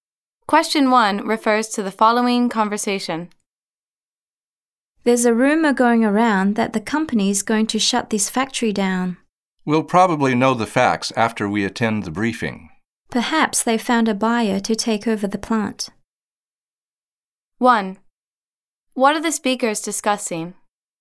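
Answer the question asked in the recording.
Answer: A rumor that the company will shut down the factory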